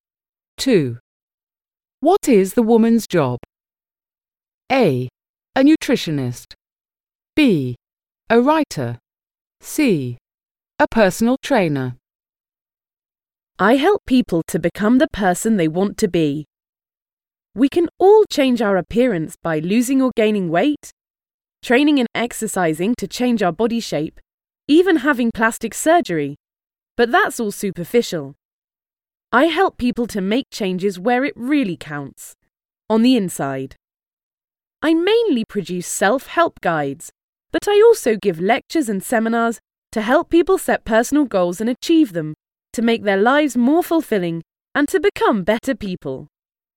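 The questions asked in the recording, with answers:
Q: What is the woman's job?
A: B: A writer.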